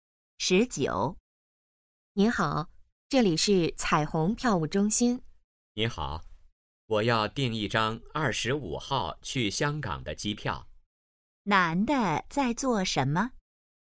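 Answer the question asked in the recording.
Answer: 订机票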